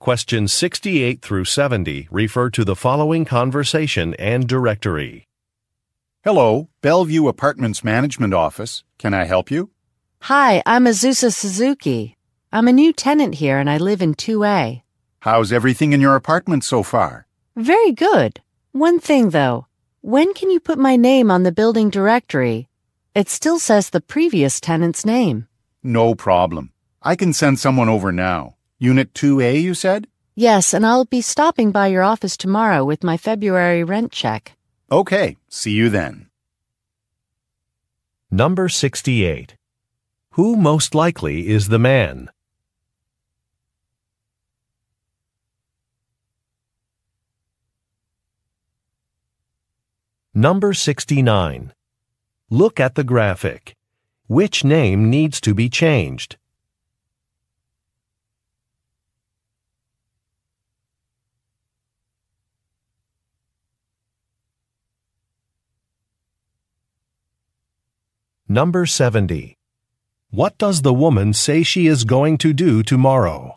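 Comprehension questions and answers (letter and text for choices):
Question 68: Who most likely is the man?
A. A maintenance worker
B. A property manager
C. A real estate agent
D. A bank employee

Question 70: What does the woman say she is going to do tomorrow?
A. Fill out a registration form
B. Meet with some neighbors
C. Order some furniture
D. Make a payment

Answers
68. B. A property manager
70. D. Make a payment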